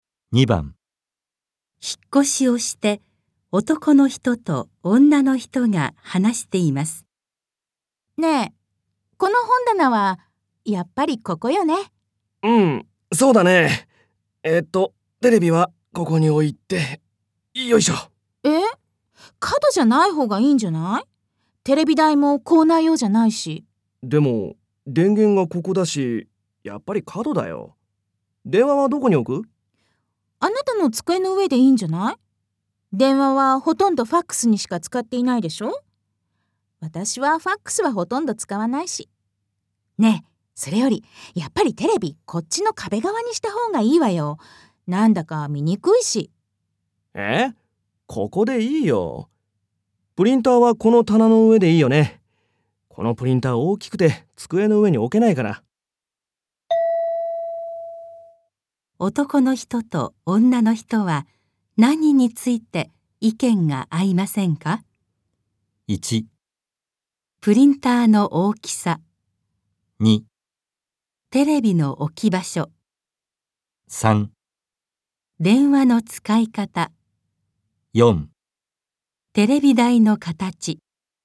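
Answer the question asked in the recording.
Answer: 2: テレビの置き場所。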